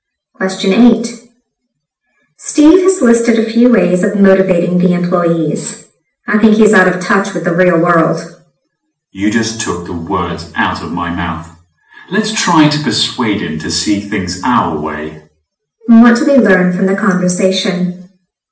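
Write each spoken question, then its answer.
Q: What do we learn from the conversation?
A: Both speakers think Steve's ideas are unrealistic.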